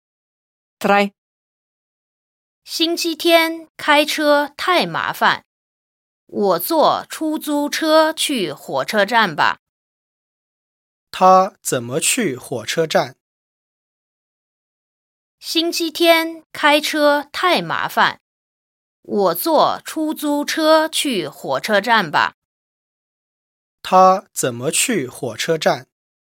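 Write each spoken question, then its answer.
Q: 他怎么去火车站?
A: 坐出租车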